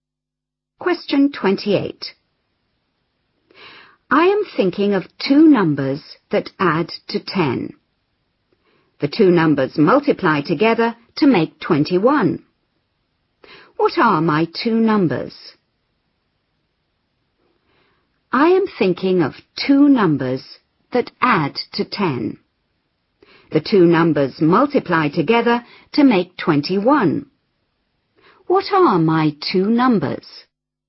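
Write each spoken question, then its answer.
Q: What are my two numbers?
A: 3 and 7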